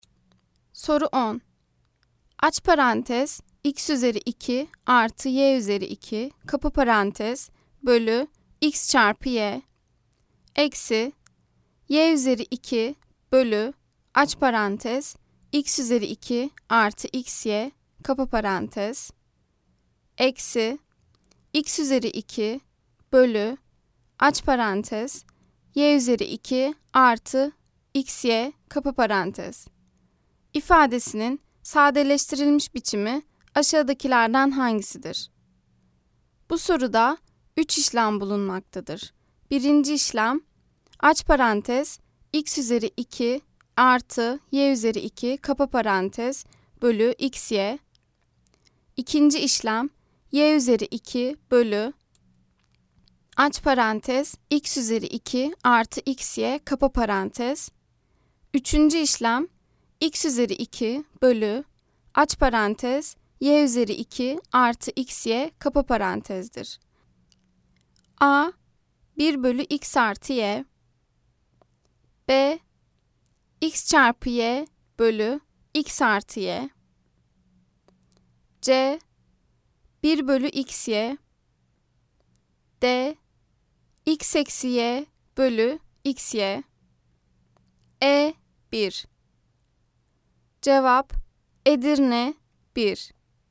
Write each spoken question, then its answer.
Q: İfadesinin sadeleştirilmiş biçimi aşağıdakilerden hangisidir?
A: Cevap Edirne 1.